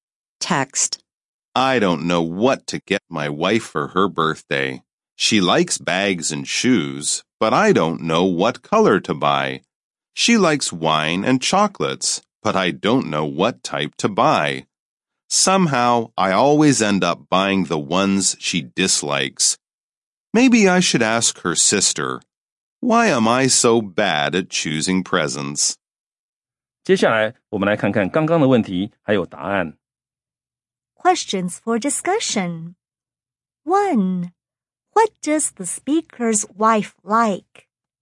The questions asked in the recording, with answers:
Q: What does the speaker's wife like?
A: She likes bags, shoes, wine, and chocolates.